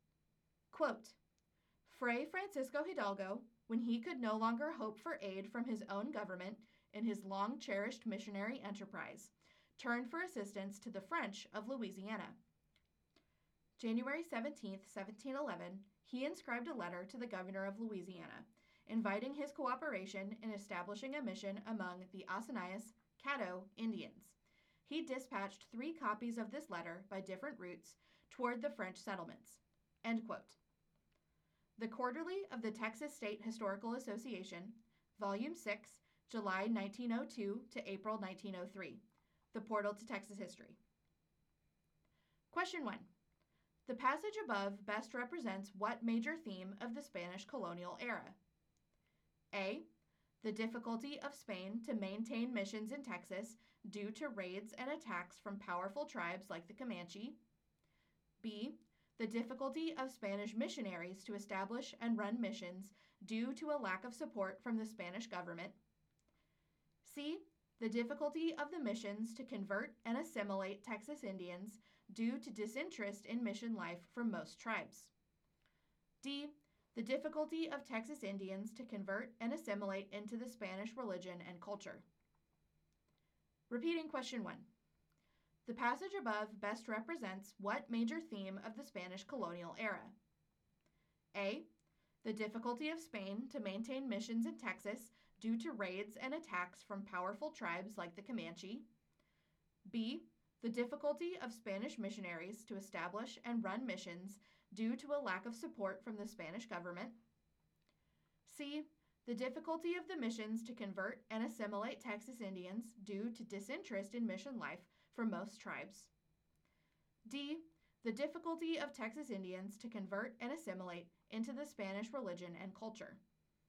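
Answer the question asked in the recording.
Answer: B: The difficulty of Spanish missionaries to establish and run missions due to a lack of support from the Spanish government.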